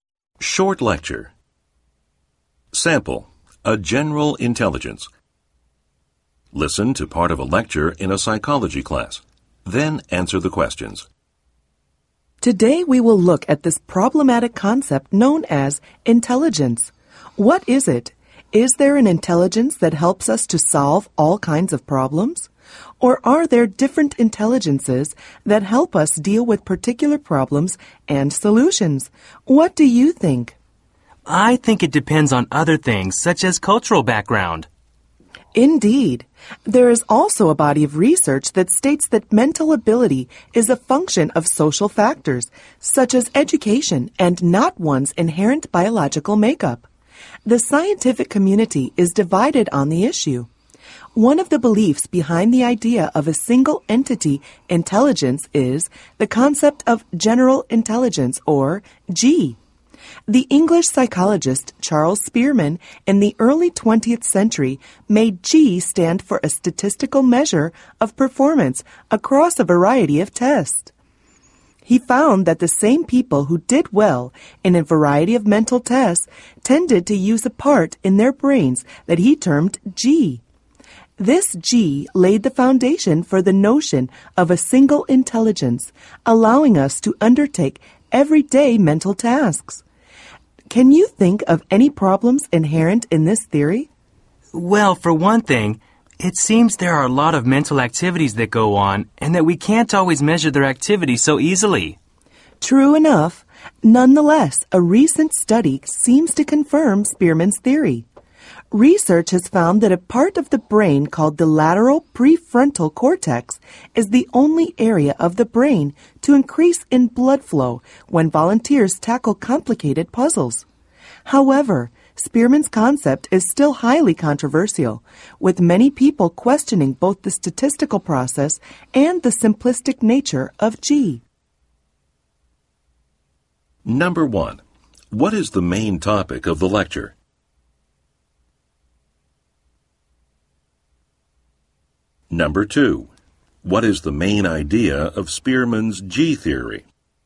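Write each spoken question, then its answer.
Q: what is the main topic of the lecture?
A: The concept of intelligence, especially Spearman's idea of general intelligence (G)

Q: what is the main idea of Spearman's G theory?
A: There is one general intelligence, shown by the same people doing well across different mental tests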